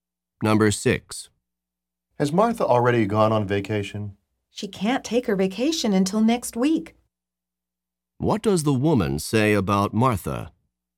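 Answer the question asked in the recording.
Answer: She hasn't gone on vacation yet; she goes next week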